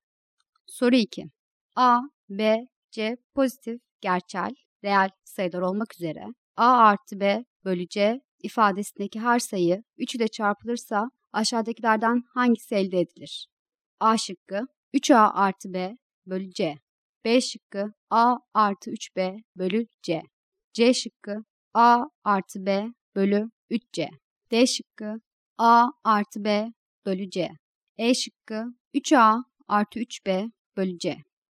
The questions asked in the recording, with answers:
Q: A, B, C pozitif, gerçel, reel sayılar olmak üzere A artı B bölü C ifadesindeki her sayı 3 ile çarpılırsa aşağıdakilerden hangisi elde edilir?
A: Doğru cevap D şıkkı.